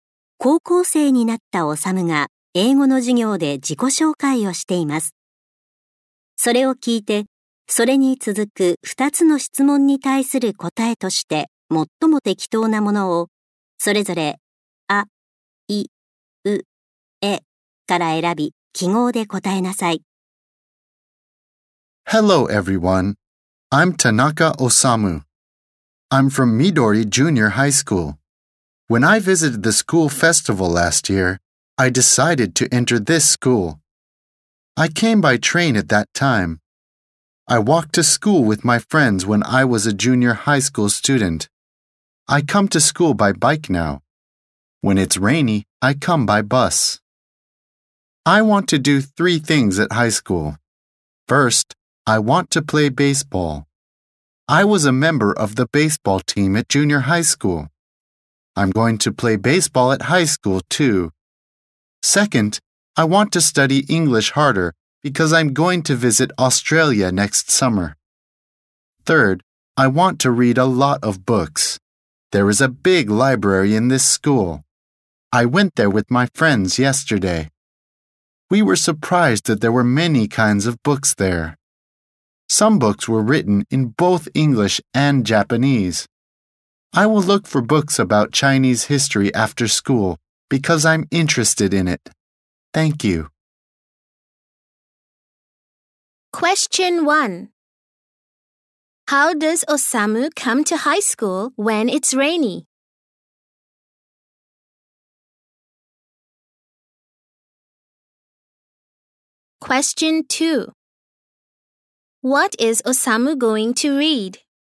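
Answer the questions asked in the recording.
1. By bus
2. Books about Chinese history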